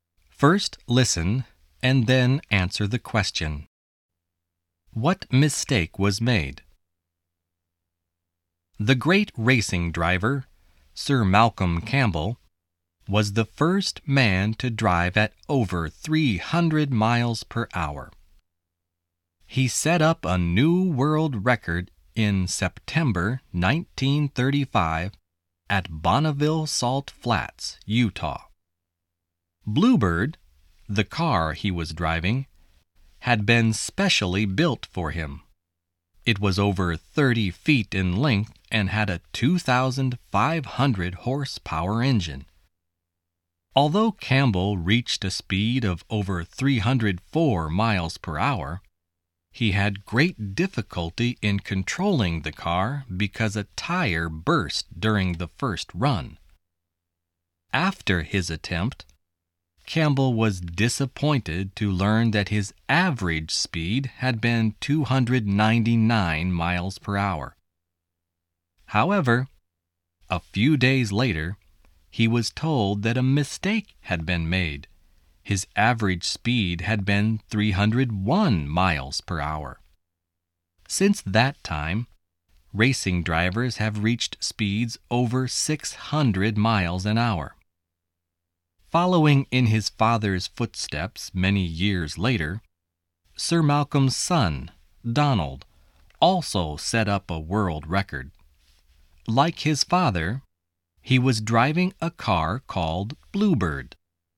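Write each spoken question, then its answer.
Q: What mistake was made?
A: His average speed was wrongly given as 299 miles per hour; it had actually been 301 miles per hour.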